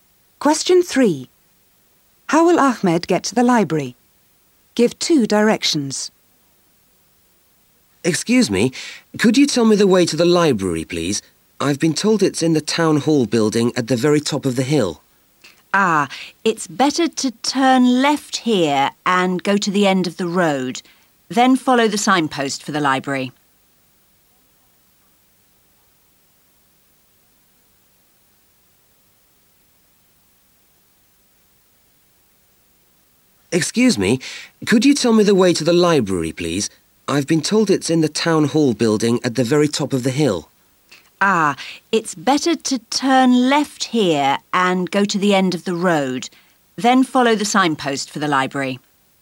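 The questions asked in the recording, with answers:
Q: How will Ahmed get to the library?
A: Turn left, go to the end of the road, then follow the signpost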